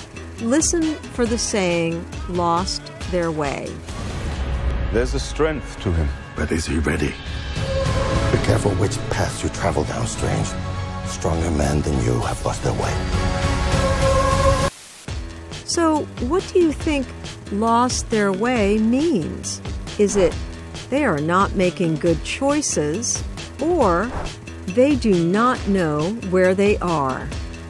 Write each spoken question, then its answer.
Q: So, what do you think lost their way means?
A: In this example, lost their way means they are not making good choices.